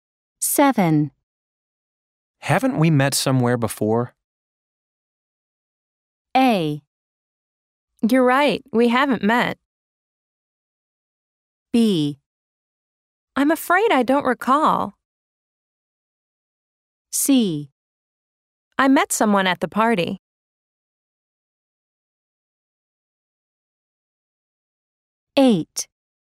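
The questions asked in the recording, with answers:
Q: Haven't we met somewhere before?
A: B: I'm afraid I don't recall.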